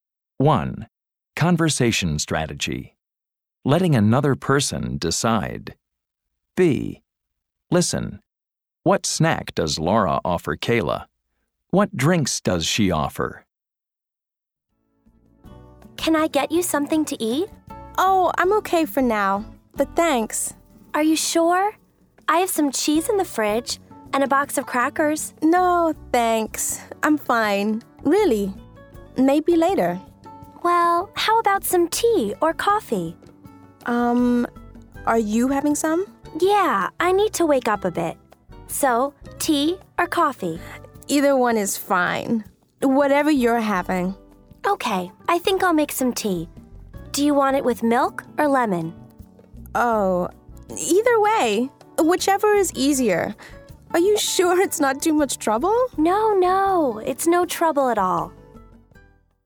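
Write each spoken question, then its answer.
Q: What snack does Laura offer Kayla?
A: Cheese and crackers

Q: What drinks does she offer?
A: Tea or coffee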